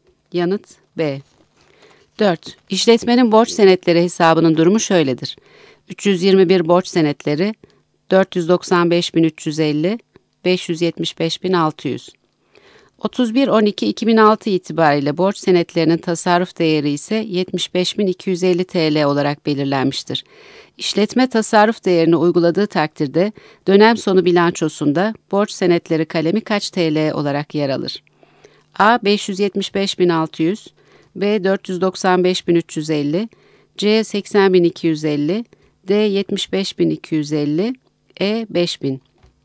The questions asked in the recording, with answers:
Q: İşletme tasarruf değerini uyguladığı takdirde dönem sonu bilançosunda borç senetleri kalemi kaç TL olarak yer alır?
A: Yanıt C.